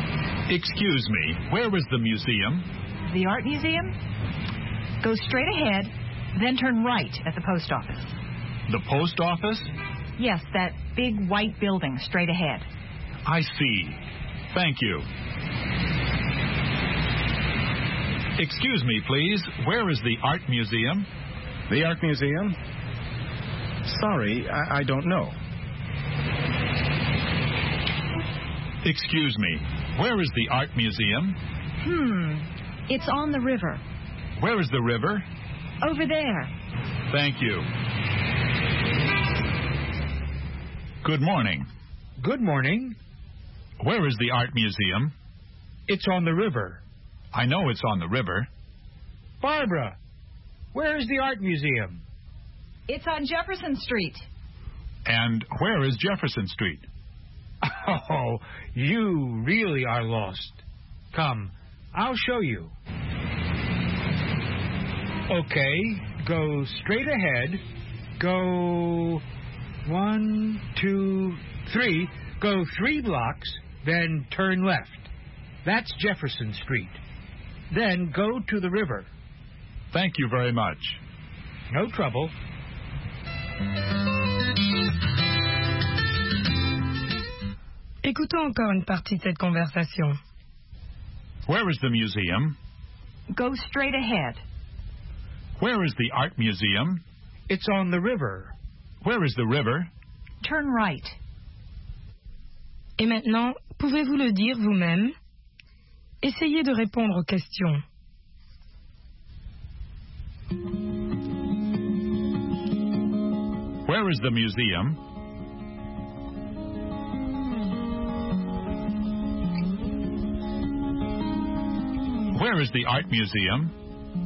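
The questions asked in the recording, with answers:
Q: Where is the museum?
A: Go straight ahead, then turn right at the post office.

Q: Where is the art museum?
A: It's on the river.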